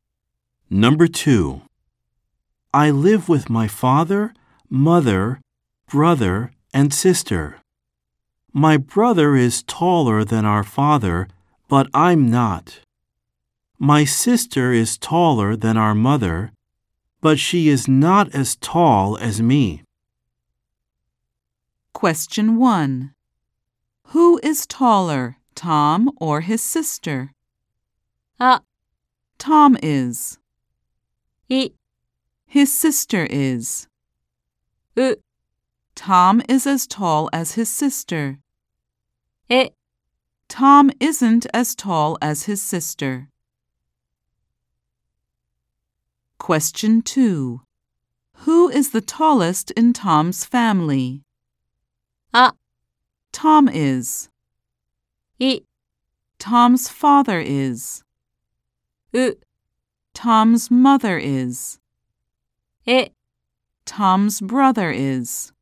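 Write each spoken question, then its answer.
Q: Who is taller, Tom or his sister?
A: あ: Tom is.

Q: Who is the tallest in Tom's family?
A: え: Tom's brother is.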